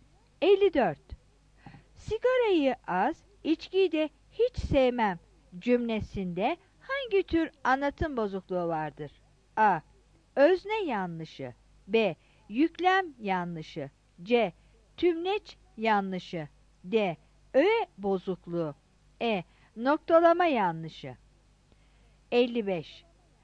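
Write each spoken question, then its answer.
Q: Sigarayı az, içkiyi de hiç sevmem cümlesinde hangi tür anlatım bozukluğu vardır?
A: B: Yüklem yanlışı.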